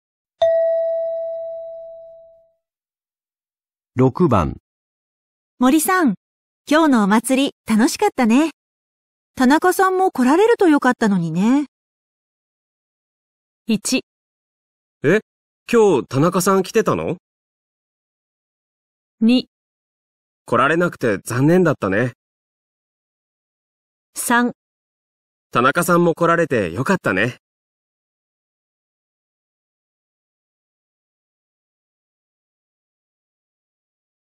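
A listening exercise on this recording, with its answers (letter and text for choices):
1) 女:森さん、今日のお祭り楽しかったね。田中さんも来られるとよかったのにね。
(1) え?今日、田中さん来てたの?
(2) 来られなくて残念だったね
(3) 田中さんも来られてよかったね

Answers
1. (2) 来られなくて残念だったね

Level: 【N2 第2回】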